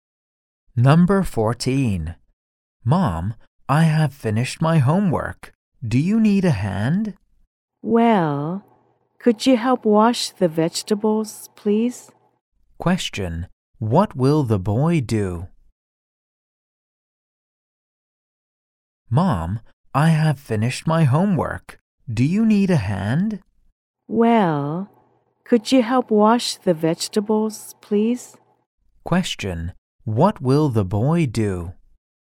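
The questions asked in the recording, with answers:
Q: What will the boy do?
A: Help wash the vegetables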